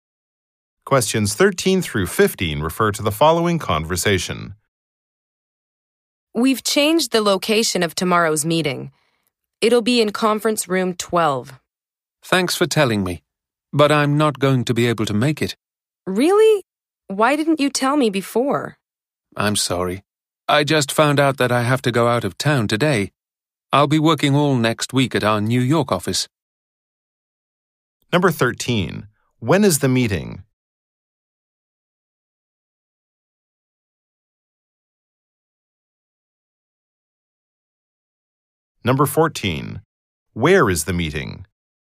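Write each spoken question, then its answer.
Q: When is the meeting?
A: Tomorrow

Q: Where is the meeting?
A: In conference room 12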